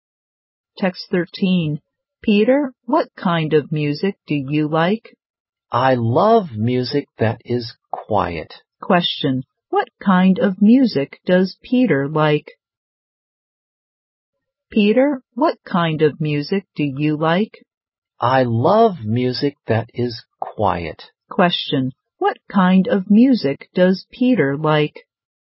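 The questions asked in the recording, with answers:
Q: What kind of music does Peter like?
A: Quiet music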